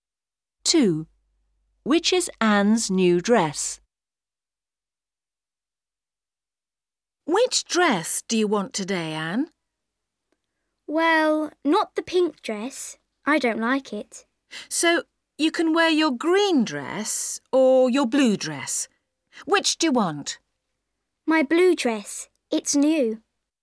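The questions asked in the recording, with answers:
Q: Which is Anne's new dress?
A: The blue dress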